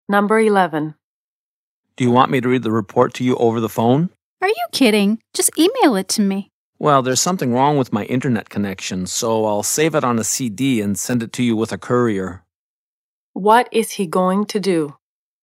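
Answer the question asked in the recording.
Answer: Save the report on a CD and send it by courier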